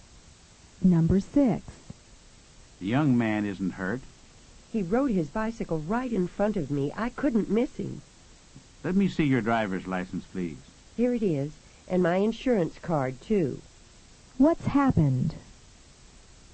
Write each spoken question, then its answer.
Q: What's happened?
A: Number 6 is C. An accident happened.